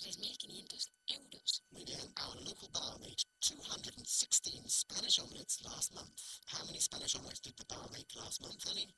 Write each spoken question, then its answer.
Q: How many Spanish omelets did the bar make last month, Annie?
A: 216.